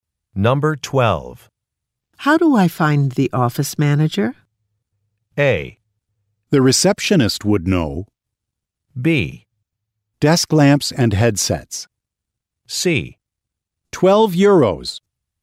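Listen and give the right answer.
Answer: A: The receptionist would know.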